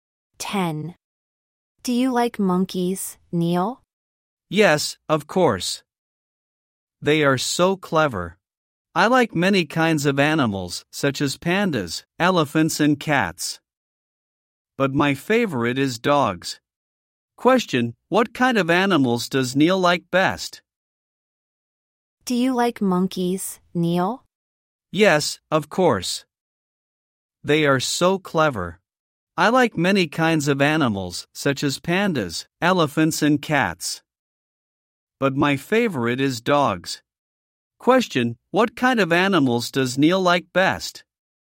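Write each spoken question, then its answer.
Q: Question, what kind of animals does Neil like best?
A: Dogs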